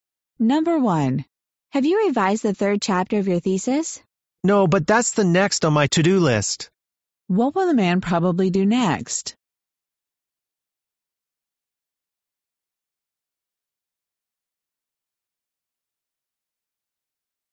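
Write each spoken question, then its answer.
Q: What will the man probably do next?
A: Revise the third chapter of his thesis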